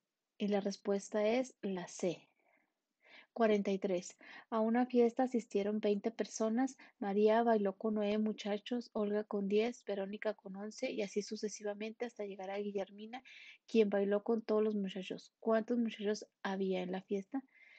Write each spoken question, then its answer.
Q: ¿Cuántos muchachos había en la fiesta?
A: 14.